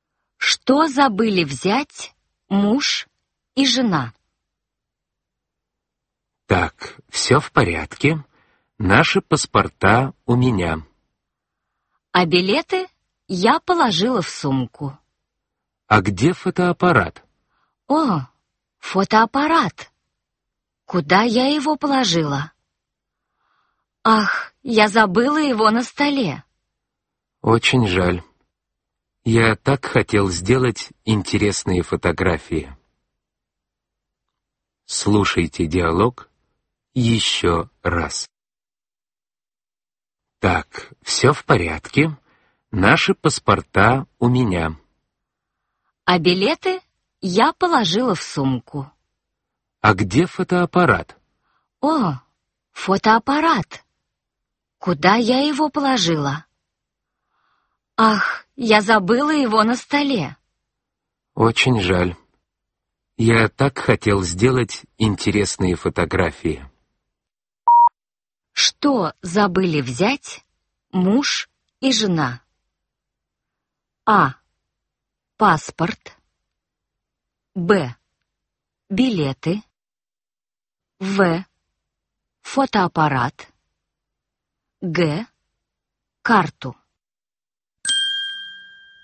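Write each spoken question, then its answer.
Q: Что забыли взять муж и жена?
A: В: Фотоаппарат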